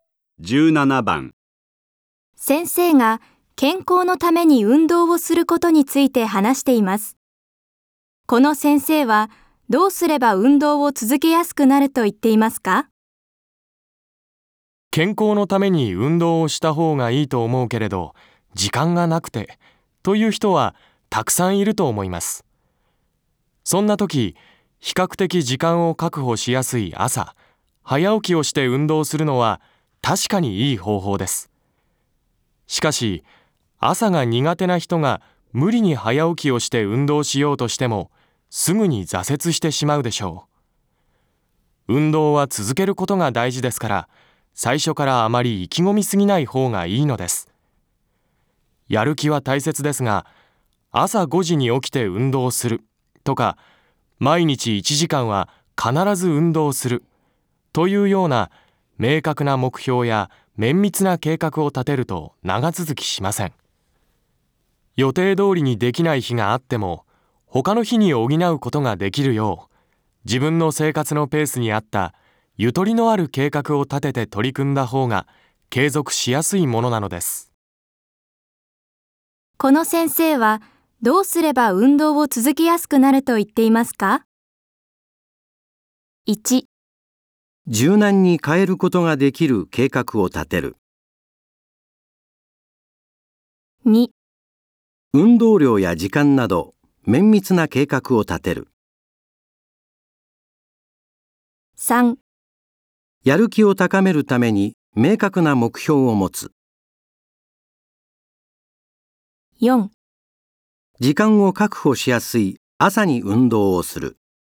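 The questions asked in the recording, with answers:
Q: この先生はどうすれば運動を続けやすくなると言っていますか?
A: 1: 柔軟に変えることができる計画を立てる。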